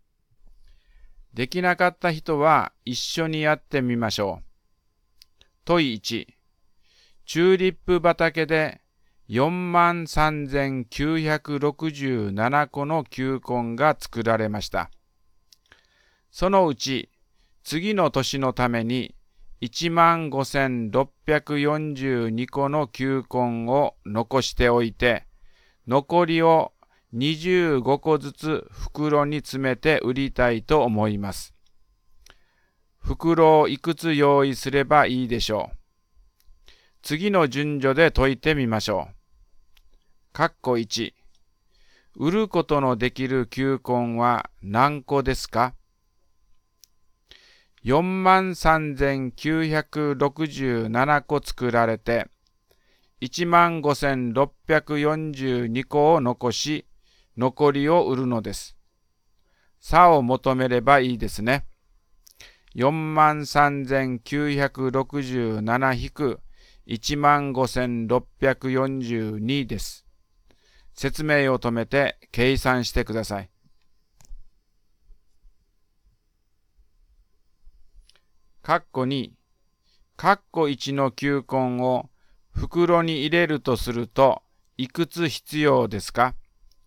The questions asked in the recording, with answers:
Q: 括弧1。売ることのできる球根は何個ですか?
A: 28,325 ですね。